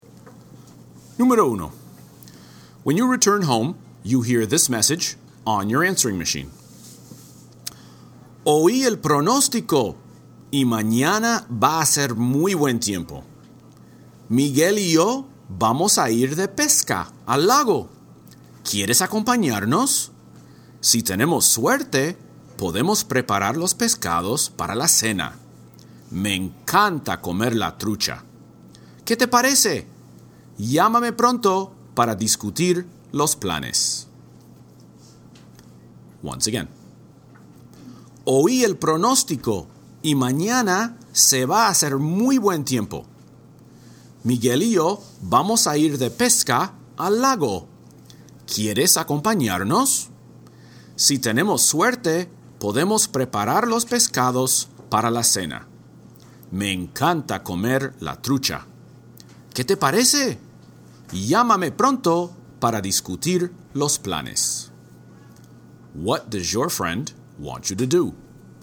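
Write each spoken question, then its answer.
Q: What does your friend want you to do?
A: Go fishing at the lake with him and Miguel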